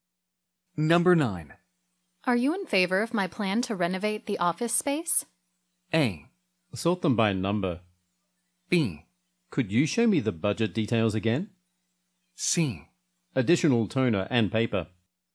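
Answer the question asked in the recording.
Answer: B: Could you show me the budget details again?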